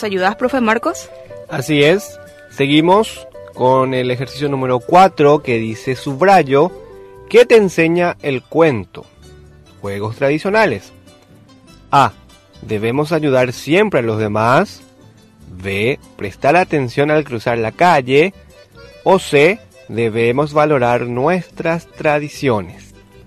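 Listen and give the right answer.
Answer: C: Debemos valorar nuestras tradiciones.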